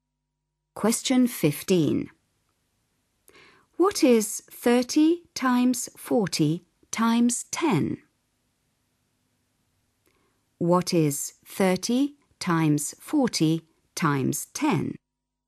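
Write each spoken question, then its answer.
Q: What is 30 times 40 times 10?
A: 12000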